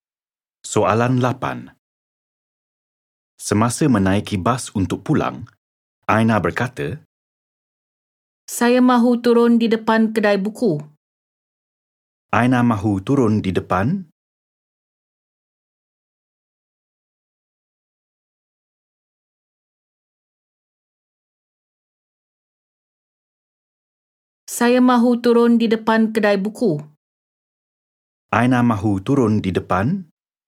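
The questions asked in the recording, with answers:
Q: Aina mahu turun di depan?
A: Kedai buku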